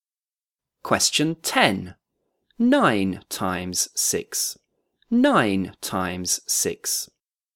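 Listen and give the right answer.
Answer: 54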